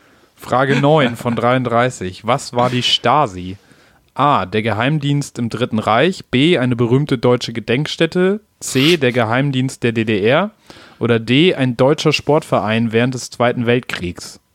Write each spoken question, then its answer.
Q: Was war die Stasi?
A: Geheimdienst in der DDR.